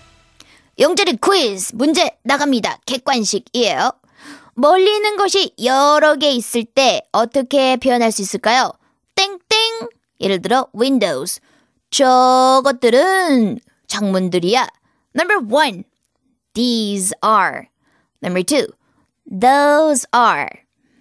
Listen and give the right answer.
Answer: Number two, those are windows.